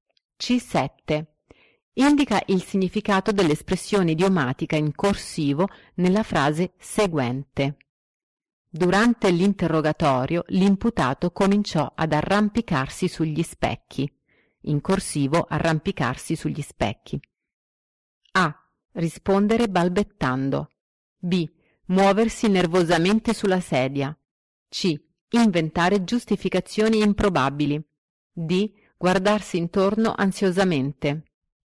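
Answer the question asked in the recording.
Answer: C: Inventare giustificazioni improbabili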